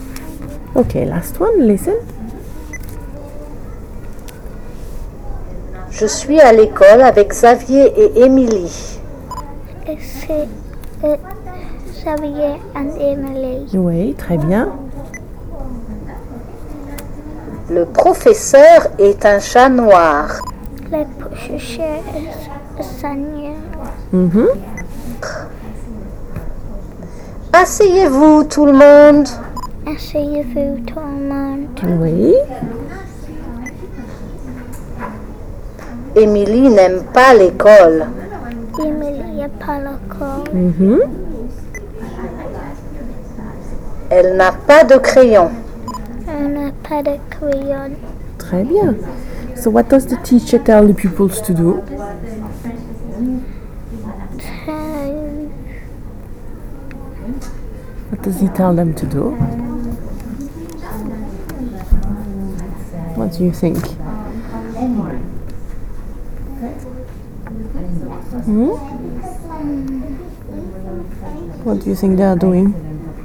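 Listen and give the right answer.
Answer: Sit down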